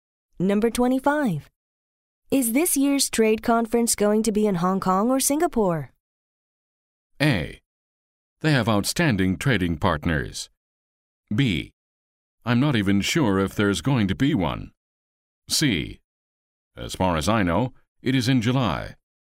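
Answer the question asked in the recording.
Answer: B: I'm not even sure if there's going to be one.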